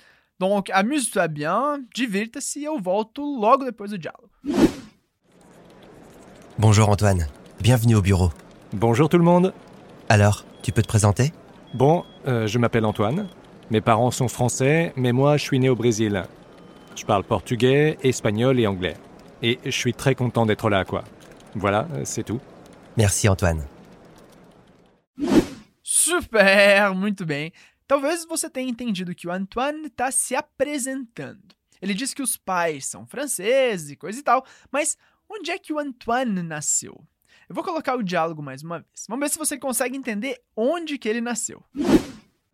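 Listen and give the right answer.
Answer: No Brasil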